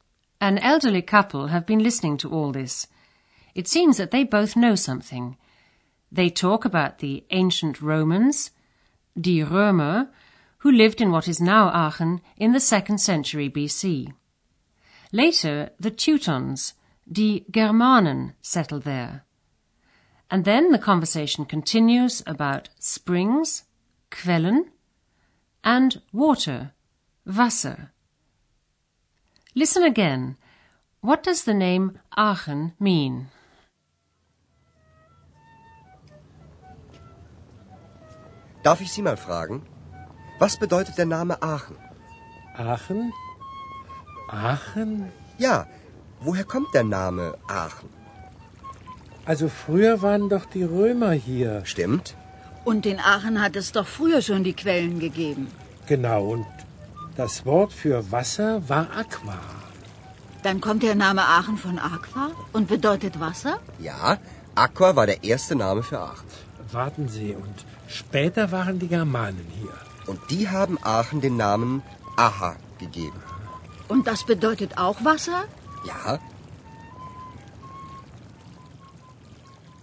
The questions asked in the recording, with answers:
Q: What does the name Aachen mean?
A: As you probably heard, the name Aachen means water.